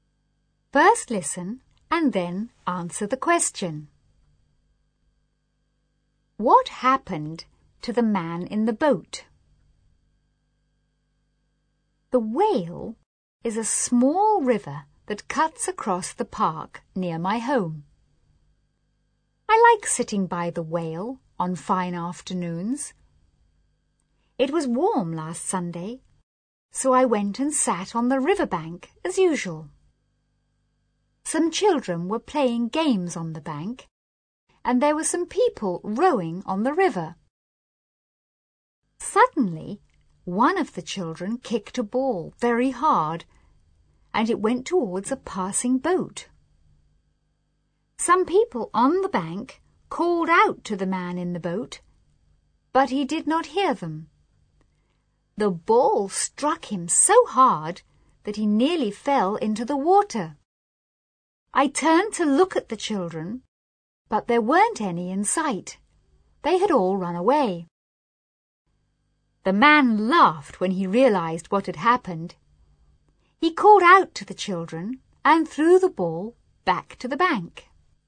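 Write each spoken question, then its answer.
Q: What happened to the man in the boat?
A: A ball kicked by a child struck him so hard that he nearly fell into the water.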